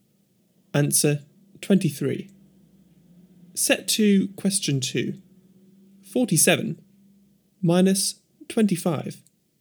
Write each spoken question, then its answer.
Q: 47 minus 25.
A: Answer 22.